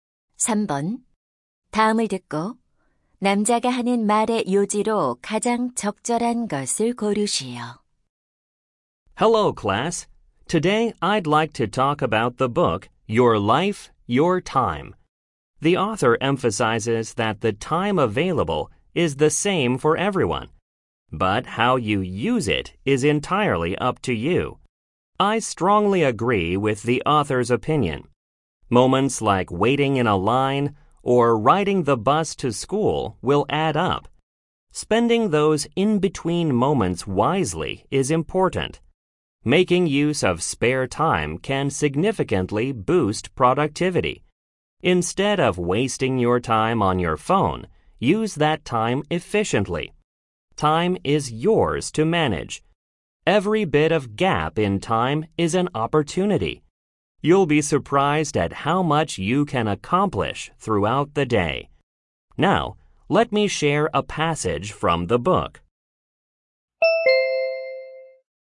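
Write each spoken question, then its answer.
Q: 다음을 듣고 남자가 하는 말의 요지로 가장 적절한 것을 고르시오.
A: 자투리 시간을 현명하게 활용하는 것이 중요하다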